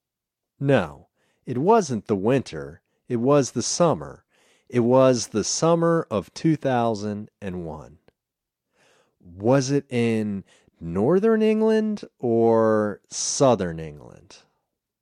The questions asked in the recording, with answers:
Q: Was it in northern England or southern England?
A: It was in northern England.